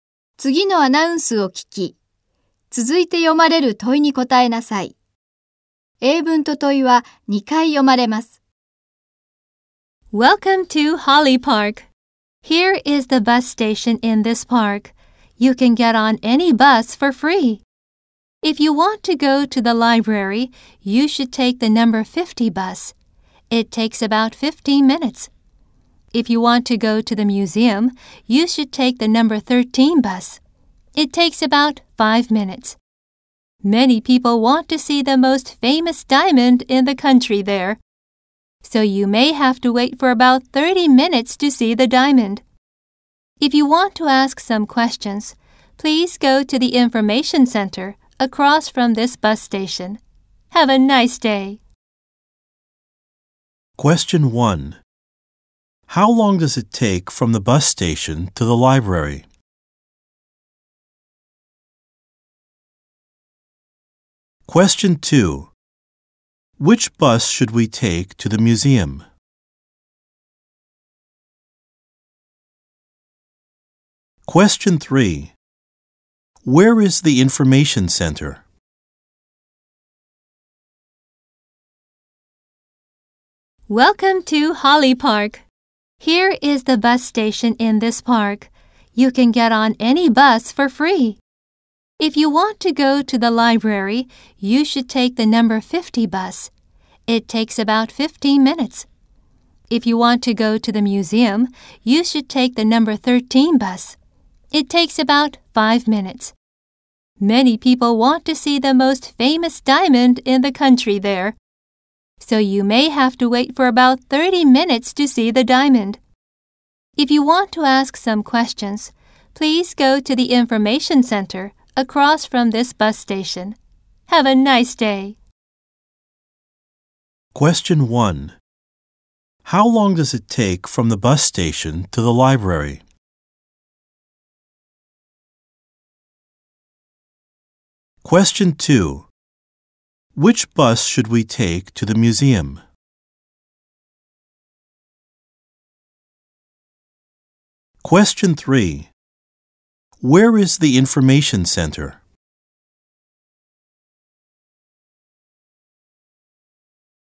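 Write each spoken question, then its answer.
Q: How long does it take from the bus station to the library?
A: About 15 minutes.

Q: Which bus should we take to the museum?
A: The number 13 bus.

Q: Where is the information center?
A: Across from the bus station.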